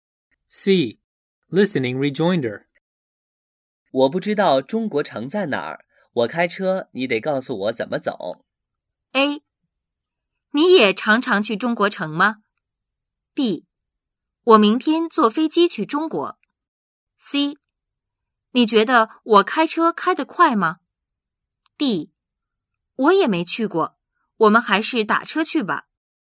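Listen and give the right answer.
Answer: D: 我也没去过,我们还是打车去吧。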